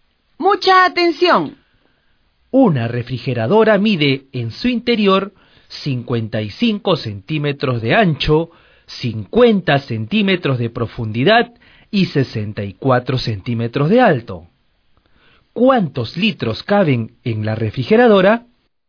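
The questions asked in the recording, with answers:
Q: ¿Cuántos litros caben en la refrigeradora?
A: 176 litros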